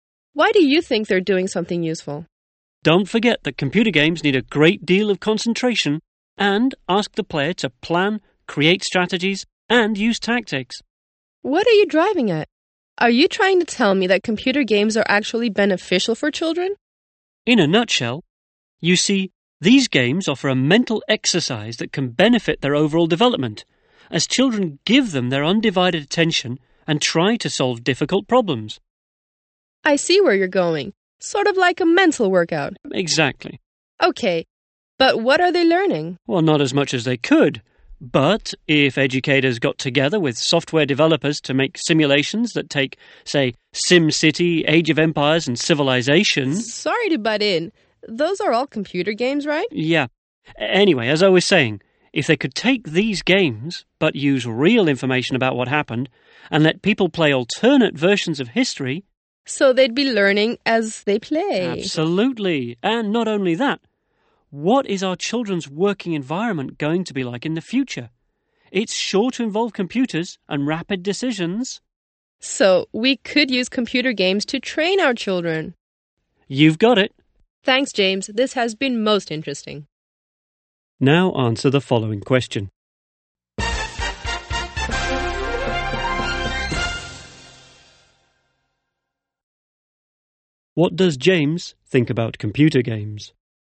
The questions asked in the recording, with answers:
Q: What does James think about computer games?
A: That they can be good for children.